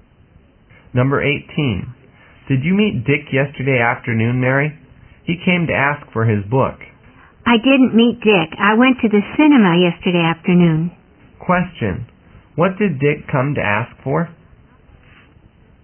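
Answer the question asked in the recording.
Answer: His book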